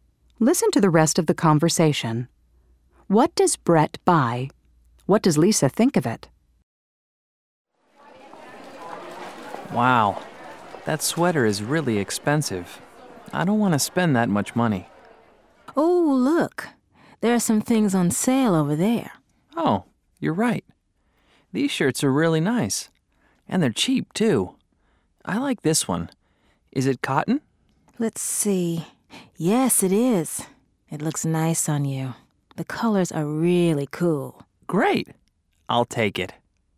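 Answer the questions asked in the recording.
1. A cotton shirt on sale
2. It looks nice on him; the colors are really cool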